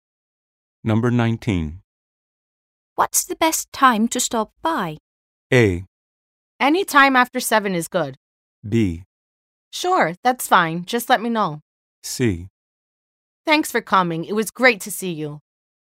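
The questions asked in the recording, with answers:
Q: What's the best time to stop by?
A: A: Any time after 7 is good.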